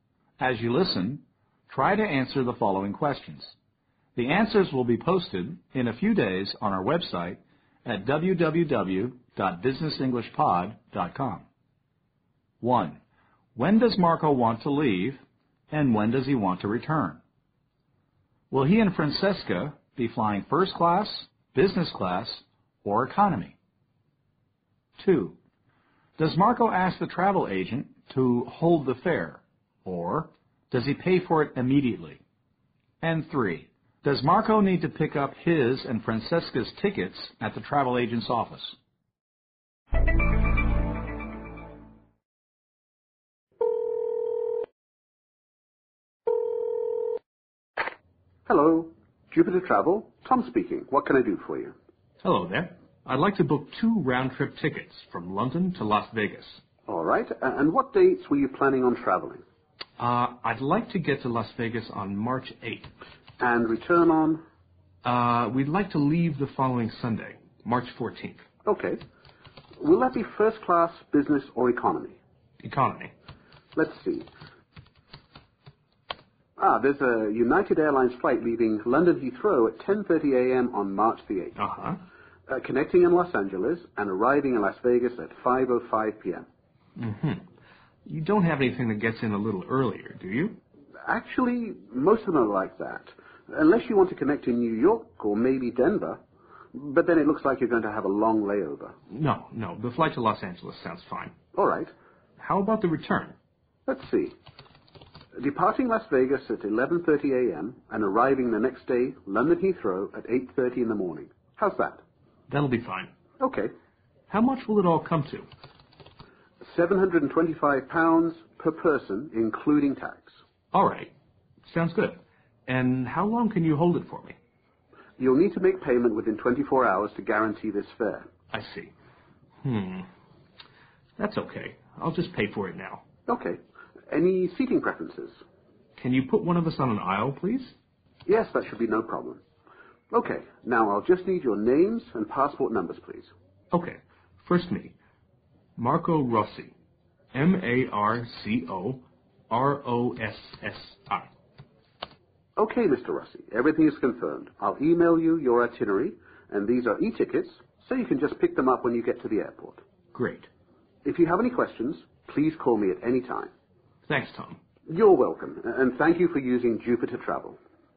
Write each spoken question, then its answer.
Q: When does Marco want to leave, and when does he want to return?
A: Marco says he'd like to get to, that is, arrive, in Las Vegas on March 8th and return on the following or next Sunday.

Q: Does Marco ask the travel agent to hold the fare, or does he pay for it immediately?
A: Marco decides to pay now.